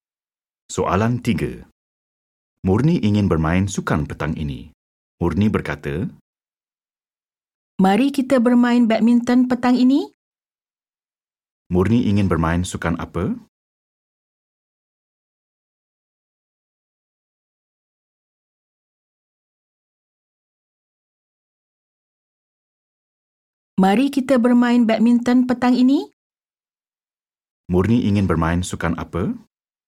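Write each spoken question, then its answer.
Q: Murni ingin bermain sukan apa?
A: badminton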